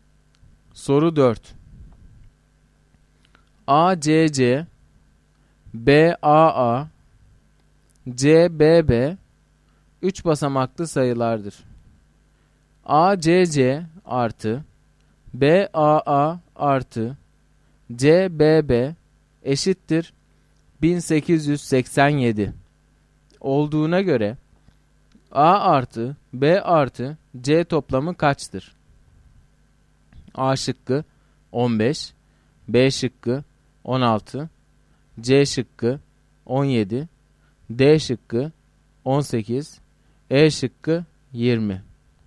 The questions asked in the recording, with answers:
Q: ACC artı BAA artı CBB eşittir 1887 olduğuna göre A artı B artı C toplamı kaçtır?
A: Doğru cevap C şıkkı.